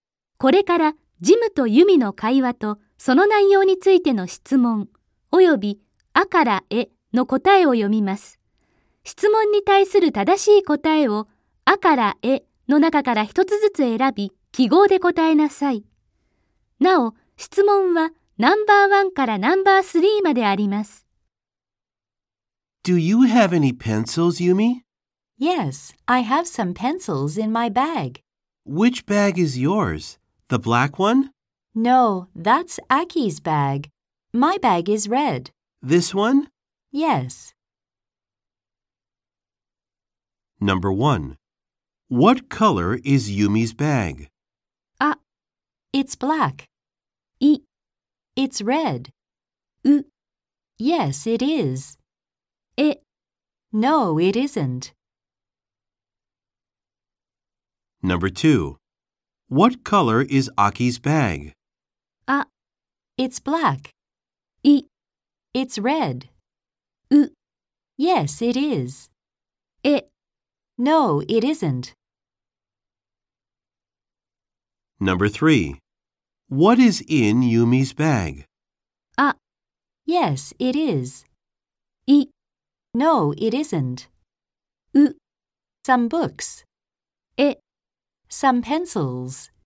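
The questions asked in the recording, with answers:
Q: What color is Yumi's bag?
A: イ: it's red.

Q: What color is Aki's bag?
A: ア: It's black.

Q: What is in Yumi's bag?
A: エ: Some pencils.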